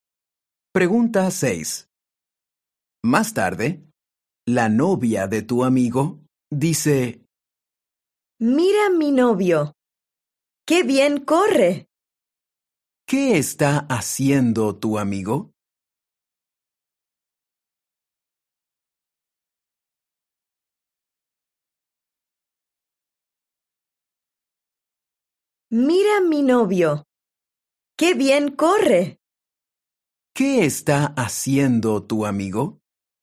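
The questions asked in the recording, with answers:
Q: ¿Qué está haciendo tu amigo?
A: Está corriendo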